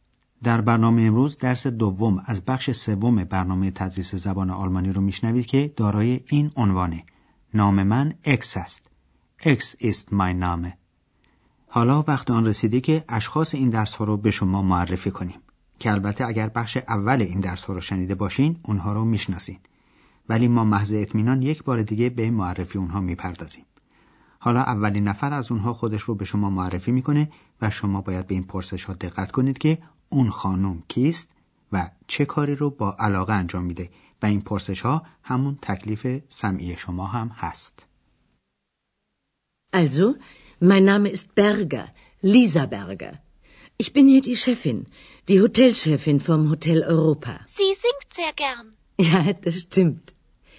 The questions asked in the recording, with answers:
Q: اون خانم کیست و چه کاری رو با علاقه انجام میده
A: پس ایشون خانم برگر مدیره هتل اروپا بود